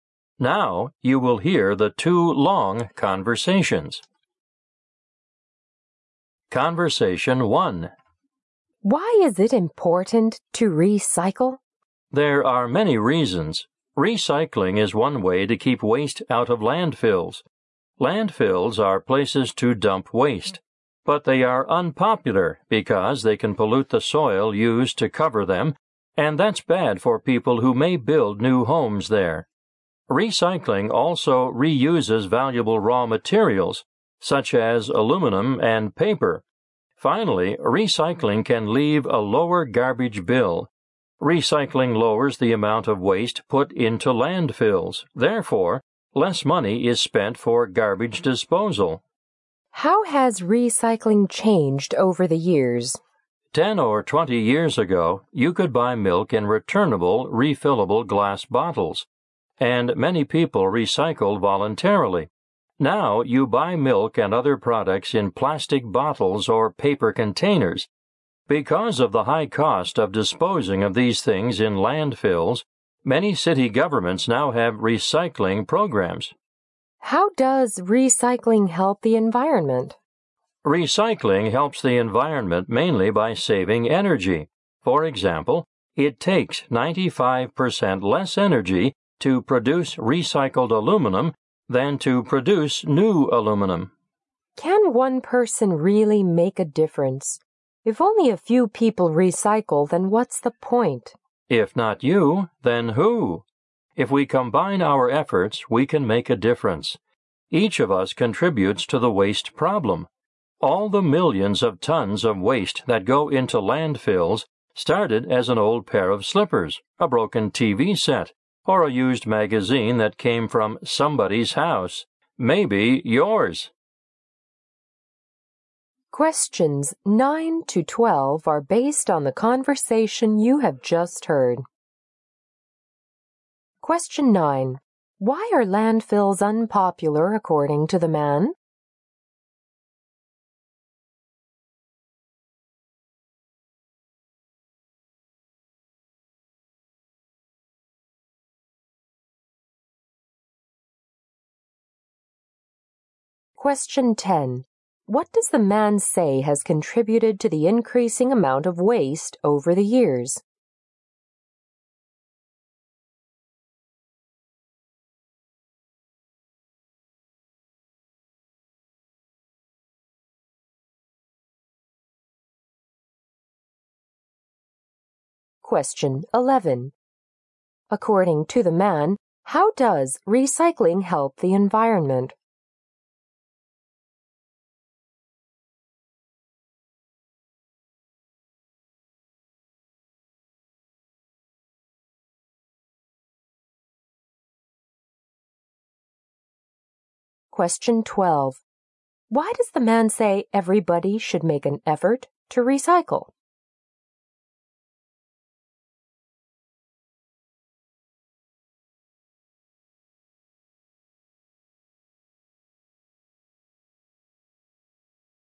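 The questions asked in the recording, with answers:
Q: Why are landfills unpopular according to the man?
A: They can pollute the soil used to cover them.

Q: What does the man say has contributed to the increasing amount of waste over the years?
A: Products now come in plastic bottles or paper containers instead of refillable glass bottles.

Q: According to the man, how does recycling help the environment?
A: Mainly by saving energy.

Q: Why does the man say everybody should make an effort to recycle?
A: Everyone contributes to the waste problem, and together we can make a difference.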